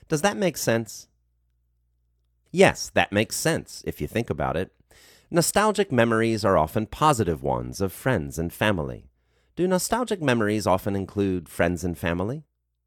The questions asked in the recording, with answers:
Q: Do nostalgic memories often include friends and family?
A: Yes, nostalgic memories often include friends and family.